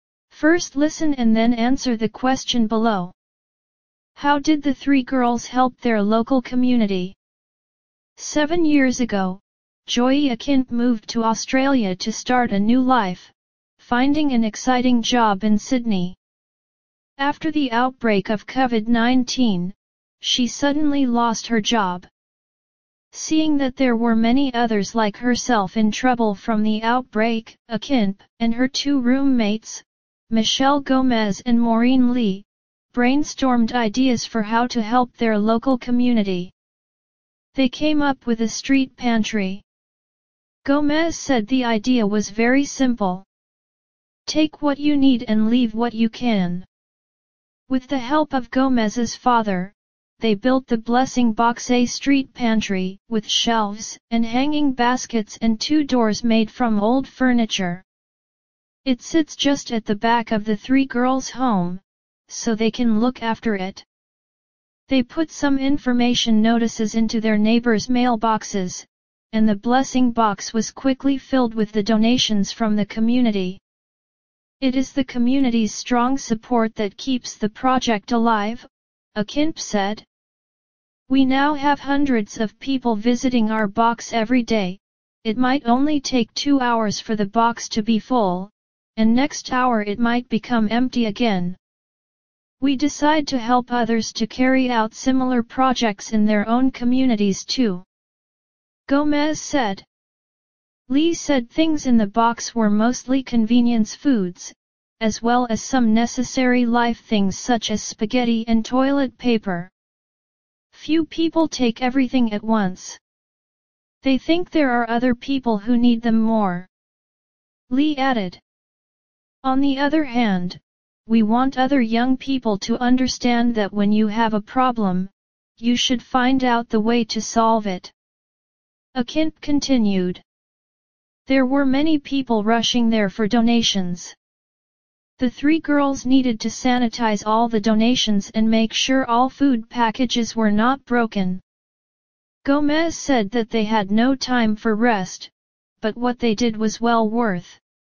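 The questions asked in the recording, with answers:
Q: How did the three girls help their local community?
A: They built the Blessing Box, a street pantry where people take what they need and leave what they can.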